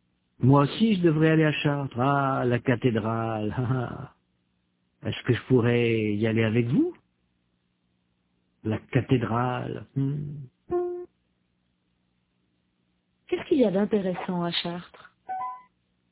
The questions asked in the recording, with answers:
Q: Qu'est-ce qu'il y a d'intéressant à Chartres?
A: La cathédrale.